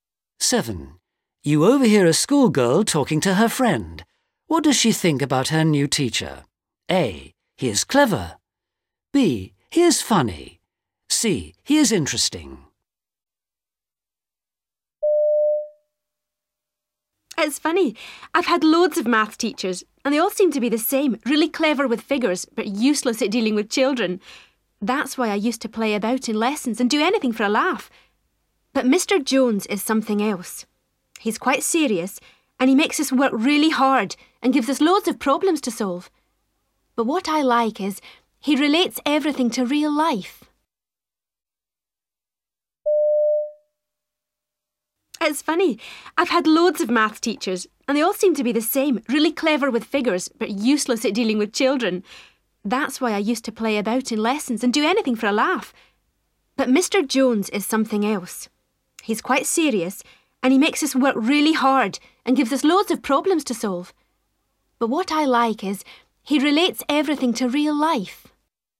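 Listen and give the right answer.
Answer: C: He is interesting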